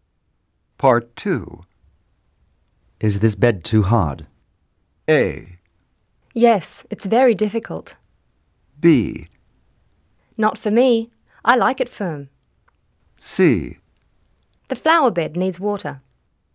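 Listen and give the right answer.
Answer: B: Not for me. I like it firm.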